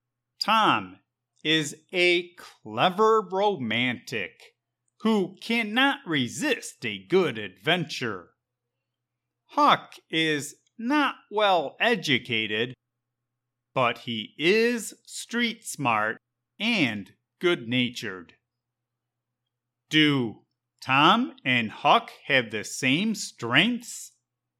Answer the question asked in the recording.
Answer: No. Tom is a clever romantic, and Huck is a street smart boy who exercises common sense.